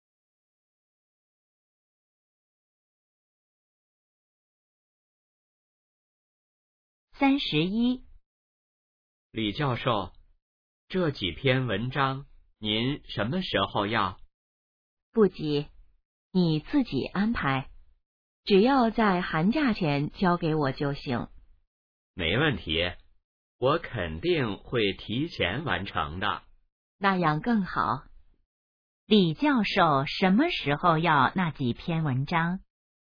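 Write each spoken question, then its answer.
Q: 李教授什么时候要那几篇文章?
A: 寒假前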